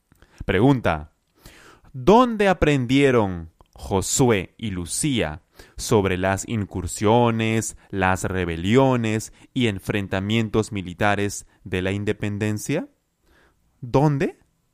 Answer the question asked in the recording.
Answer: En el colegio, en el colegio